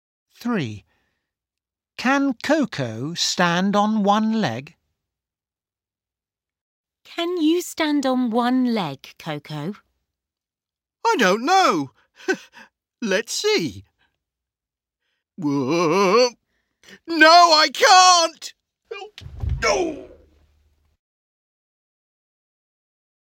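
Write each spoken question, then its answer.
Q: Can Coco stand on one leg?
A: No, she can't.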